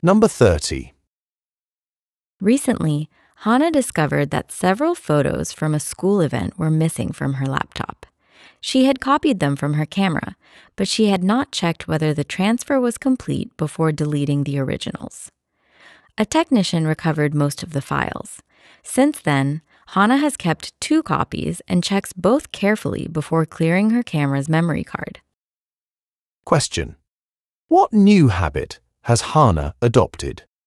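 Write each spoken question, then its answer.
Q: What new habit has Hannah adopted?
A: She keeps two copies of her photos and checks both before clearing her camera's memory card.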